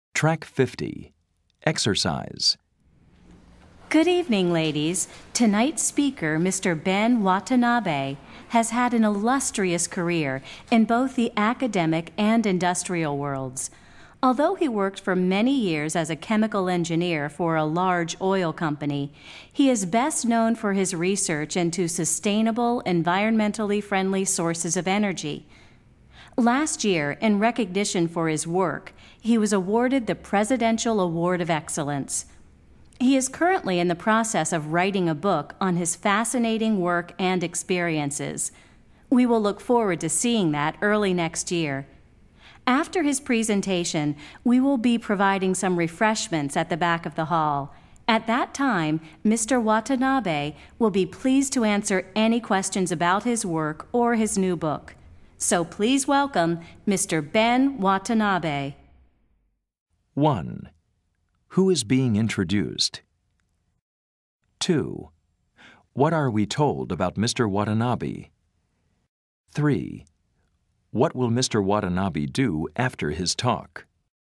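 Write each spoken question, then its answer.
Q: Who is being introduced?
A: A speaker, Ben Watanabe, a researcher in sustainable energy

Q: What will Mr. Watanabe do after his talk?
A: Answer questions about his work or new book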